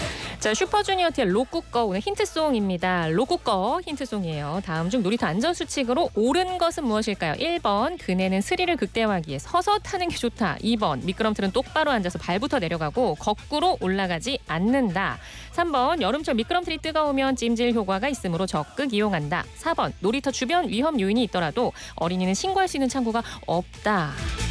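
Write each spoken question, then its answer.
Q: 다음 중 놀이터 안전수칙으로 옳은 것은 무엇일까요?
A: 2: 미끄럼틀은 똑바로 앉아서 발부터 내려가고 거꾸로 올라가지 않는다.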